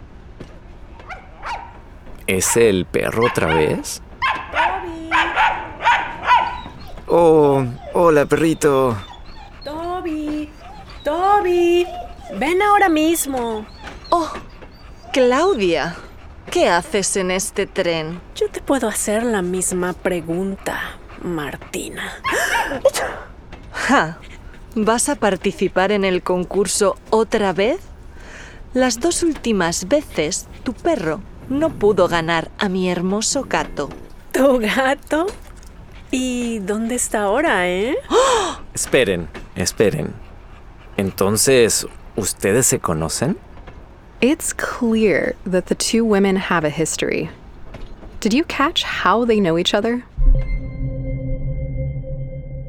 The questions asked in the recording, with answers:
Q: Did you catch how they know each other?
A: Exacto. They've competed against each other in the contest, or rather, their pets have.